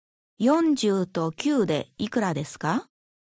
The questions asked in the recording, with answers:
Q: 40と9でいくらですか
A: ?49